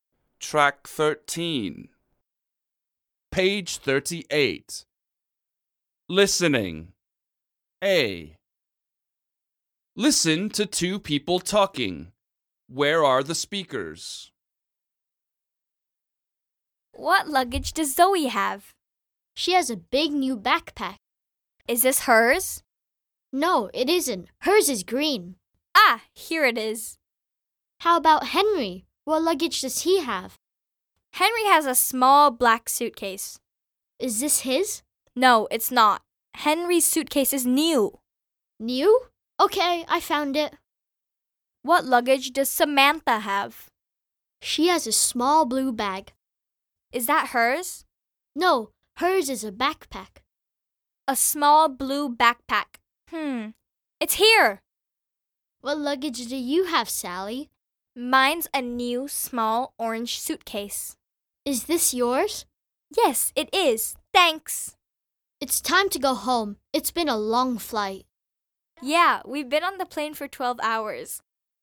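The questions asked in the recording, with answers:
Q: Where are the speakers?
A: At the airport (collecting luggage after a flight)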